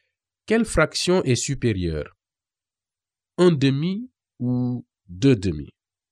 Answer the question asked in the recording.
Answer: Deux demi est supérieur à un demi, car le numérateur 2 est supérieur au numérateur 1.